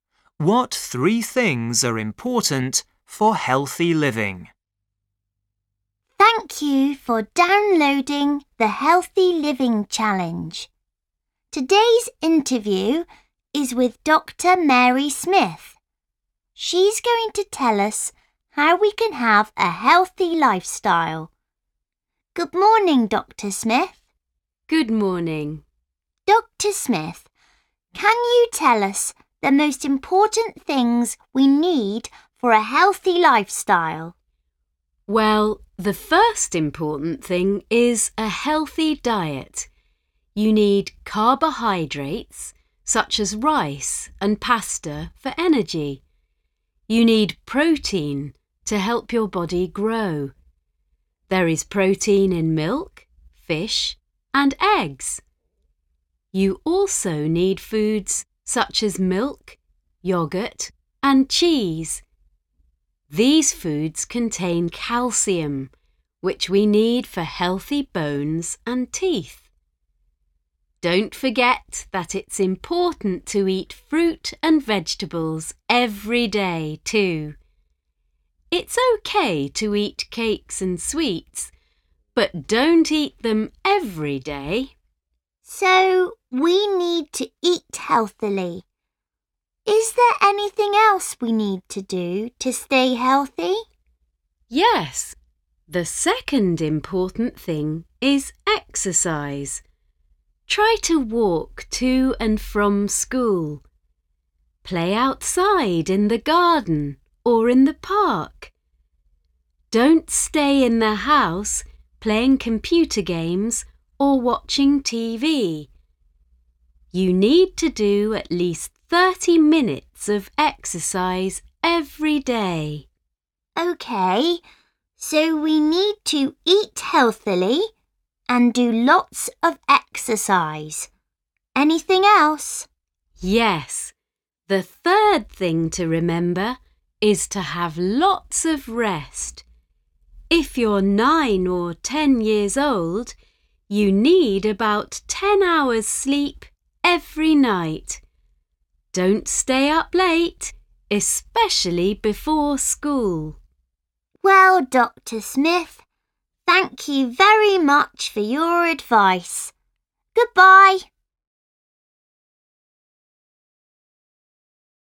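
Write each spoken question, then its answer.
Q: What three things are important for healthy living?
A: A healthy diet, exercise, and lots of rest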